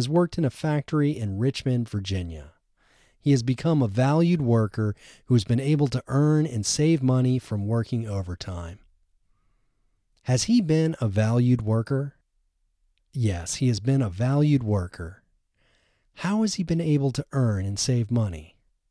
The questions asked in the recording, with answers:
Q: How has he been able to earn and save money?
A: He has been able to earn and save money from working overtime.